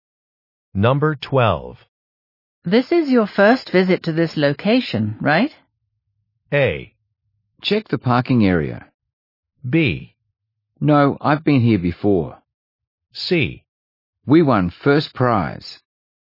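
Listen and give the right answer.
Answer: B: No, I've been here before.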